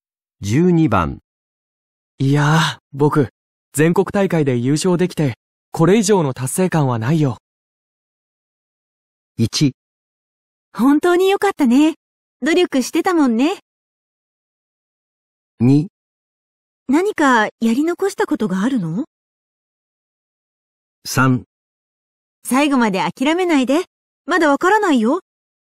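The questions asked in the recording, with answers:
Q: いやー、僕、全国大会で優勝できて、これ以上の達成感はないよ。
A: 1: 本当に良かったね。努力してたもんね。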